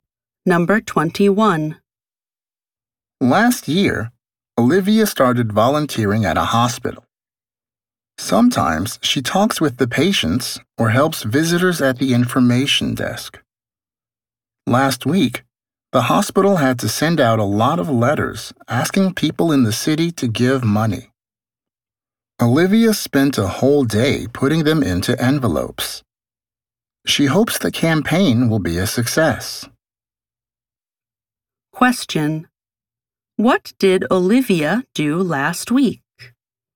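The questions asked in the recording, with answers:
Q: What did Olivia do last week?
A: She spent a whole day putting letters into envelopes.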